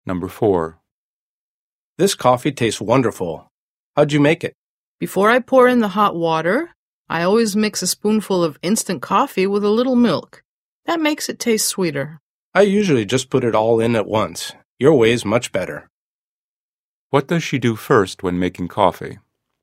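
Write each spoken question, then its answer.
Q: What does she do first when making coffee?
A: She mixes a spoonful of instant coffee with a little milk.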